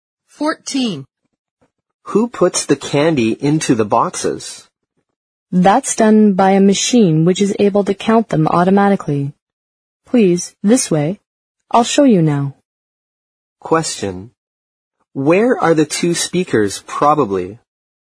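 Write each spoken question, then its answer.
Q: Where are the two speakers, probably?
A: In a candy factory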